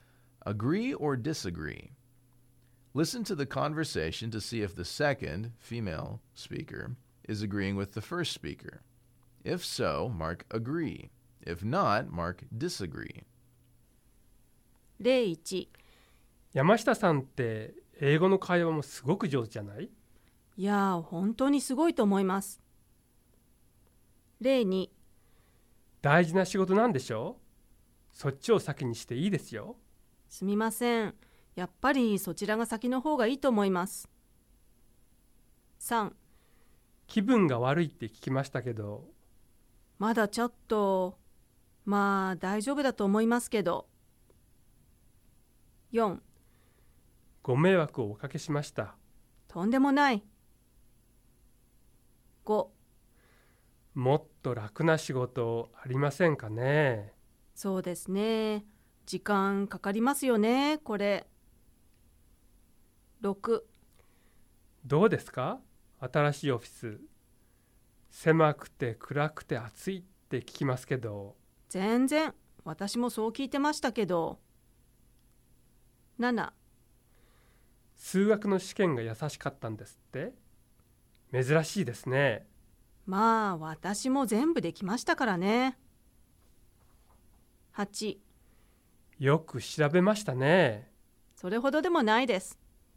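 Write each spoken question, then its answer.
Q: Agree or disagree?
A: disagree

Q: Agree or disagree?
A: agree

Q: Agree or disagree?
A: disagree

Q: Agree or disagree?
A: agree

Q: Agree or disagree?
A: disagree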